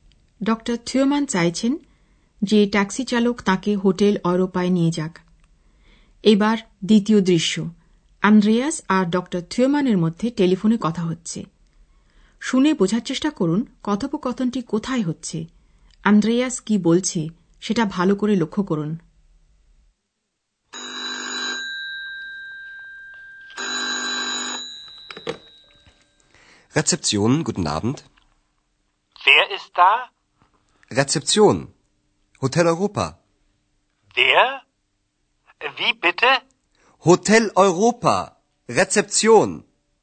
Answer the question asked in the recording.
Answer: আন্দ্রেয়াস কথা বলছে হোটেলের reception রেসেপশন থেকে